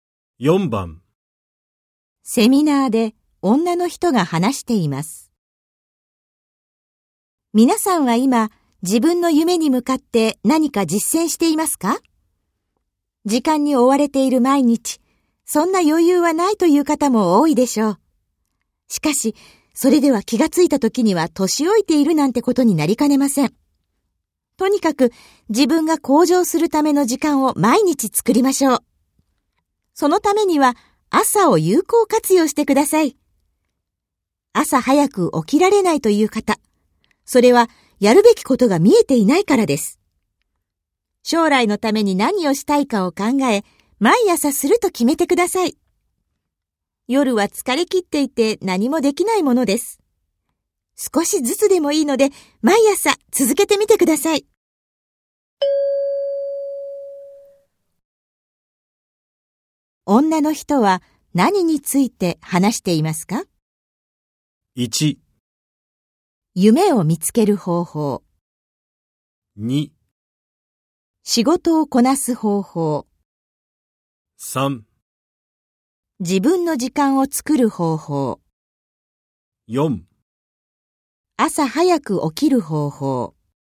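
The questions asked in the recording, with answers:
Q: 女の人は何について話していますか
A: 3: 自分の時間を作る方法。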